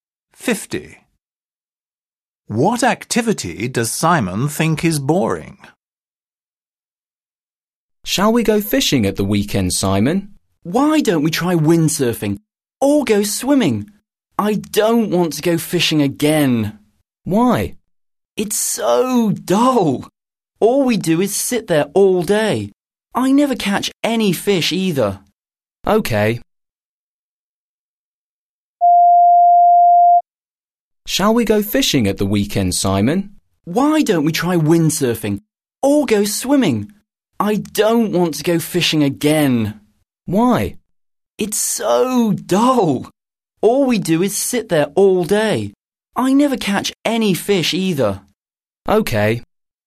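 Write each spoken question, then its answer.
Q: What activity does Simon think is boring?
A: fishing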